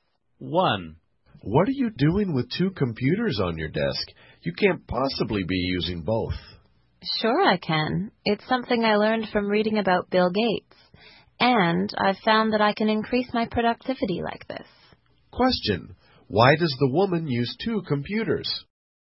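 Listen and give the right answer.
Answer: To increase her productivity, as she learned from reading about Bill Gates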